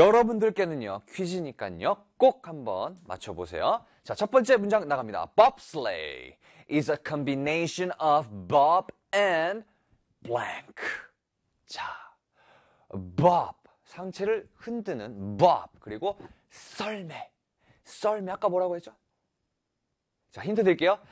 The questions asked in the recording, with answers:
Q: Bobsleigh is a combination of Bob and blank.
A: 정답은 sled.